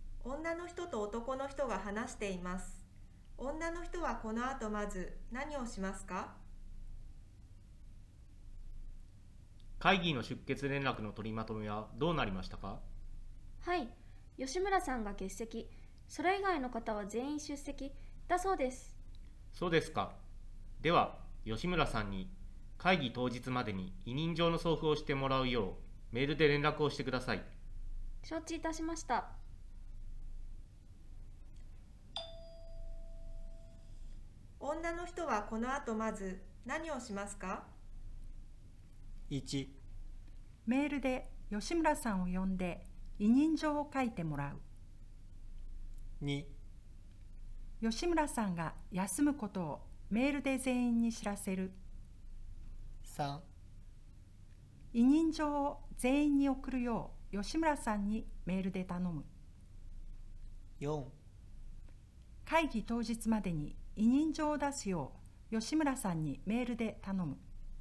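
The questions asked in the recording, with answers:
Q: 女の人はこの後まず何をしますか?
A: 4: 会議当日までに委任状を出すよう吉村さんにメールで頼む。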